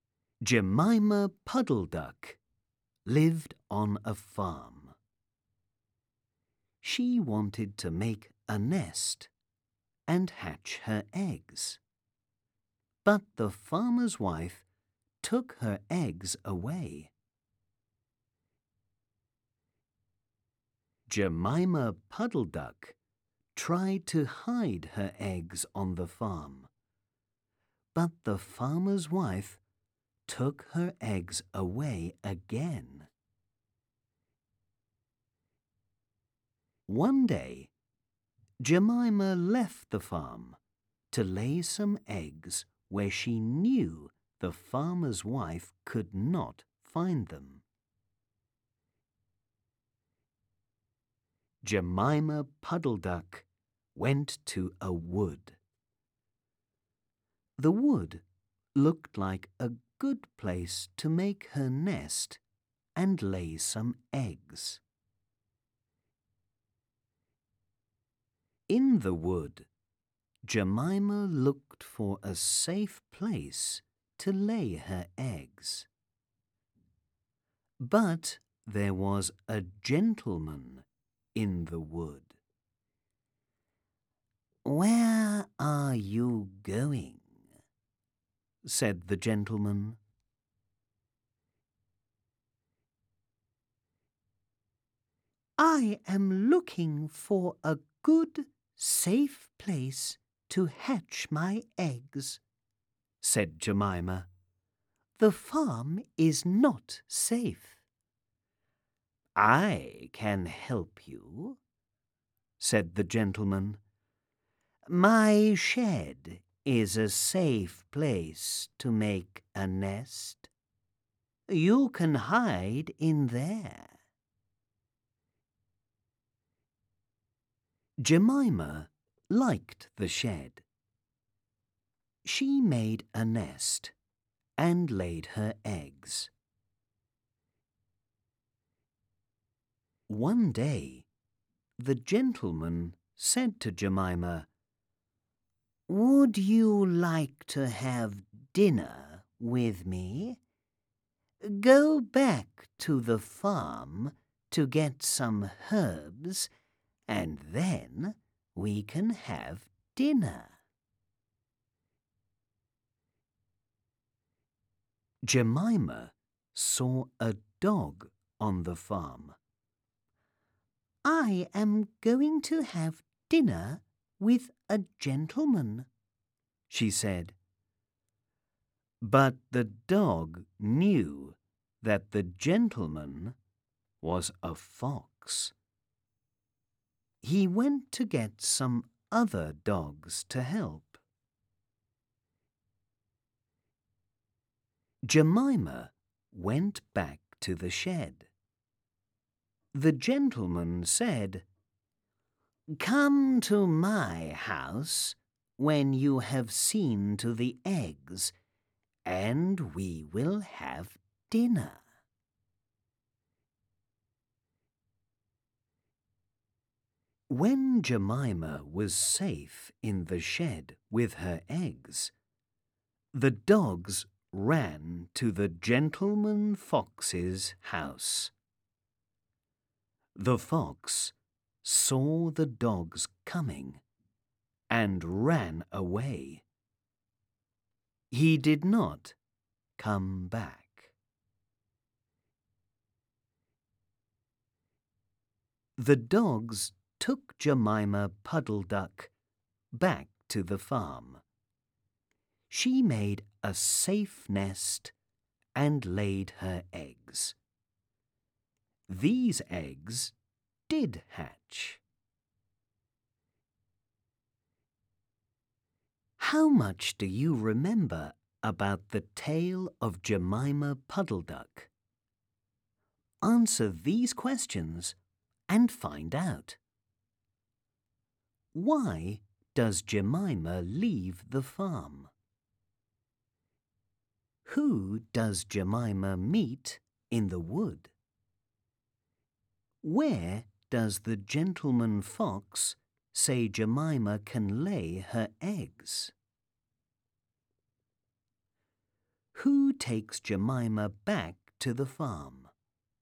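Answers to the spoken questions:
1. To lay her eggs where the farmer's wife could not find them
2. A gentleman (a fox)
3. In his shed
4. The dogs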